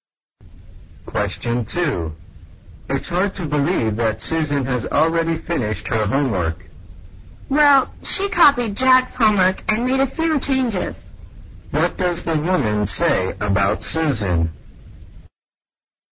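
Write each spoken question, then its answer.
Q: What does the woman say about Susan?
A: Susan copied Jack's homework and made a few changes.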